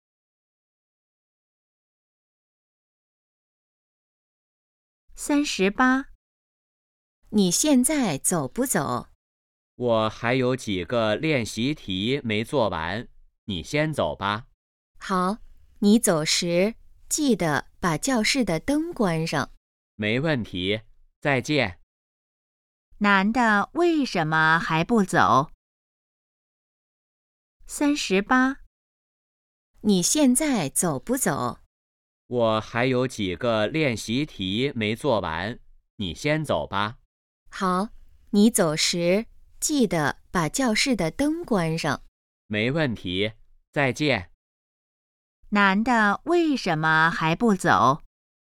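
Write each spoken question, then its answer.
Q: 男的为什么还不走?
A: 练习题还没做完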